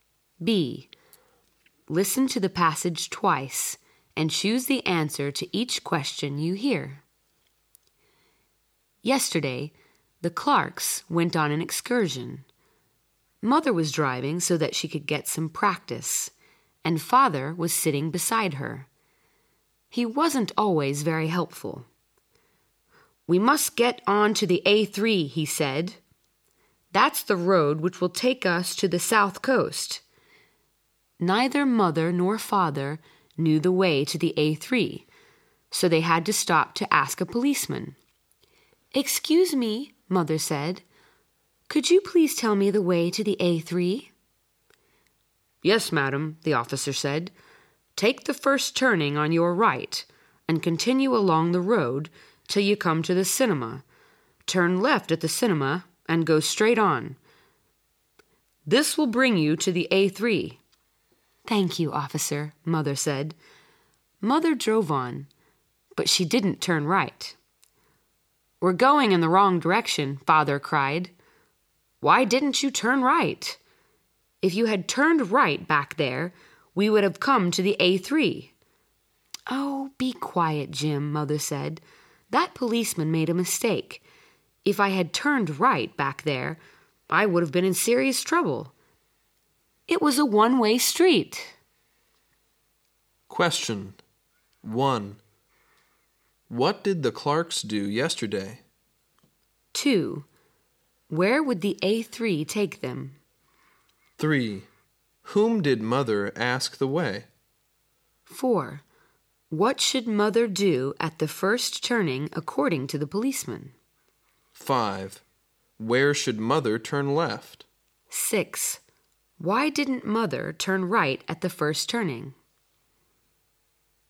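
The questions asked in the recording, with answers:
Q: What did the Clarks do yesterday?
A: They went on an excursion.

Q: Where would the A3 take them?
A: To the South Coast.

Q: Whom did Mother ask the way?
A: A policeman.

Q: What should Mother do at the first turning according to the policeman?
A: Turn right.

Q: Where should Mother turn left?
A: At the cinema.

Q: Why didn't Mother turn right at the first turning?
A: Because it was a one-way street.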